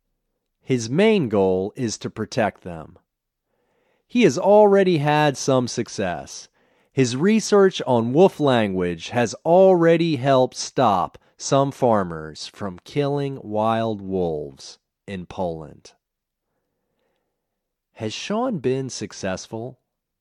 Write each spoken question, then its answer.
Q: Has Sean been successful?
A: Yes, he has had some success.